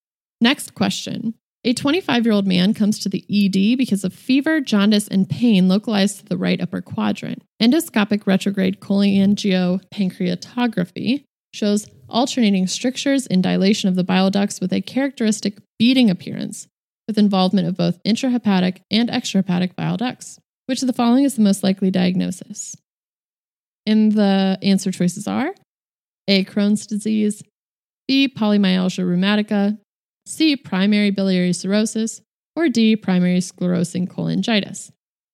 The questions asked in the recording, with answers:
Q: Which of the following is the most likely diagnosis?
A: And the correct answer is primary sclerosing cholangitis.